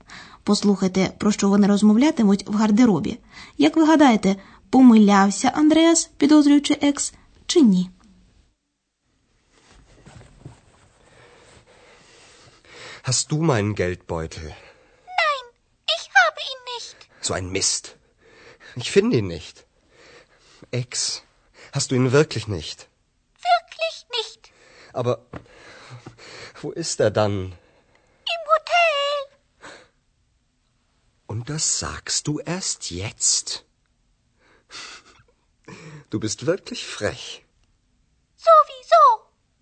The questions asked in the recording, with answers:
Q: Як ви гадаєте, помилявся Андреас, підозрюючи екс, чи ні?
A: Отже, хоча Екс і не мала ніякого відношення до зникнення гаманця, але з самого початку їй було відомо, що Андреас залишив його в готелі.